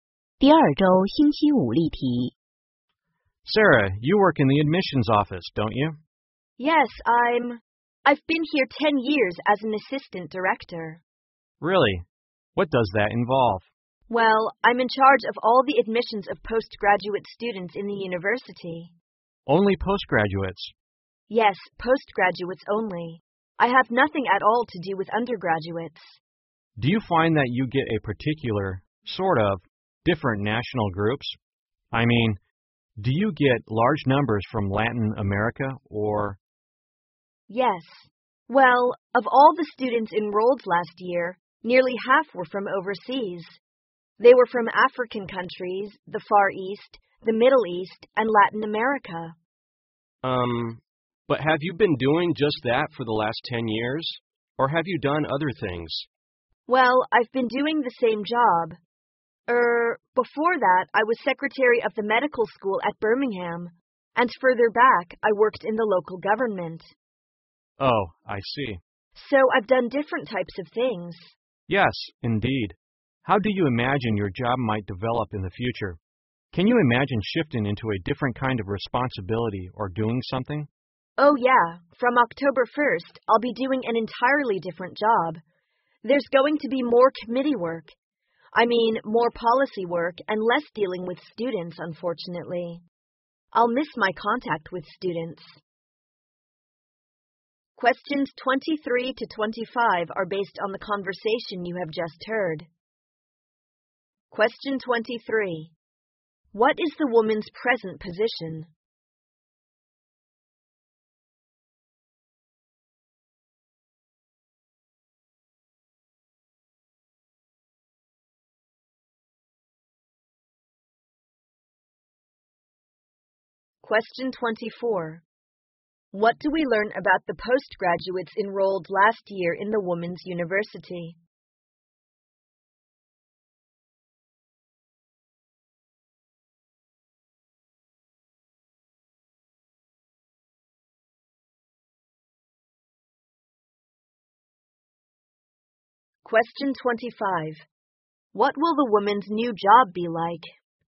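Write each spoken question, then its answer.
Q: What is the woman's present position?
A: Assistant director of the admissions office

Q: What do we learn about the postgraduates enrolled last year in the Women's University?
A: Nearly half were from overseas

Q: What will the woman's new job be like?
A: More committee and policy work, less dealing with students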